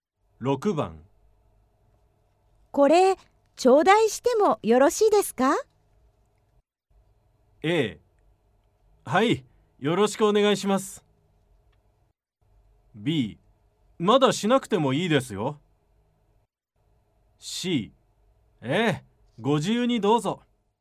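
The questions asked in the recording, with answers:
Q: これ、頂戴してもよろしいですか?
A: C: ええ、ご自由にどうぞ。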